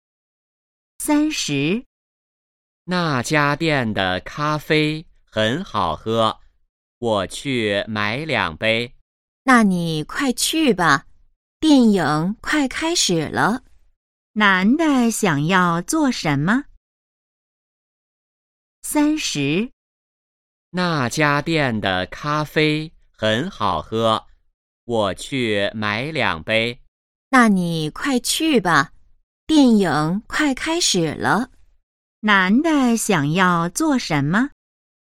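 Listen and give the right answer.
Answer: 去买两杯咖啡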